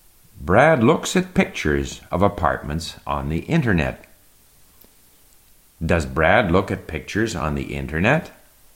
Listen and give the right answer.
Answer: Yes, Brad looks at pictures of apartments on the internet.